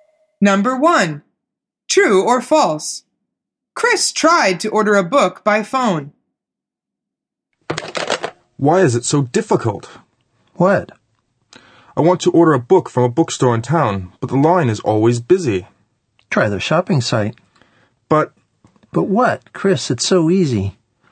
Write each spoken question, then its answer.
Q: Chris tried to order a book by phone.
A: The answer is true.